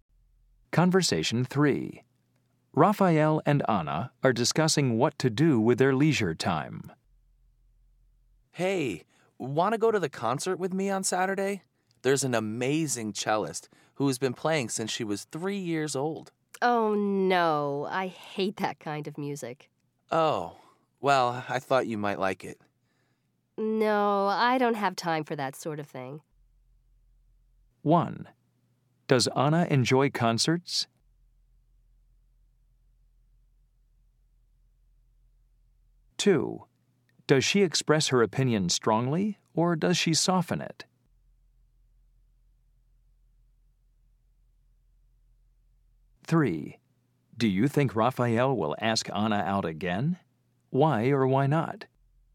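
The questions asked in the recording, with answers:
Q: Does Anna enjoy concerts?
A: No

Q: Does she express her opinion strongly, or does she soften it?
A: Strongly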